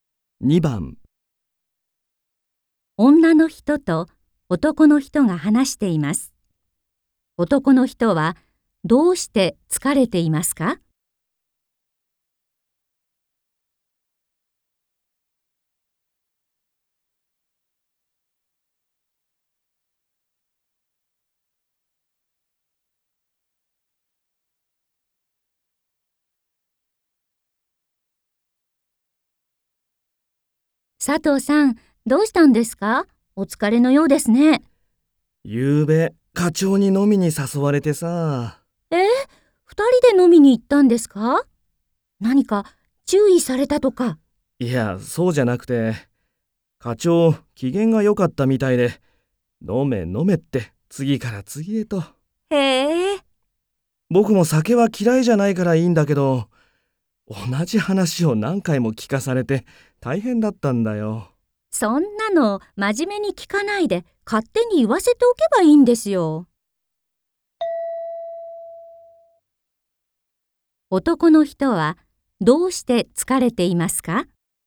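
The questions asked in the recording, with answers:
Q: 男の人はどうして疲れていますか?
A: 課長に同じ話を何回も聞かされたから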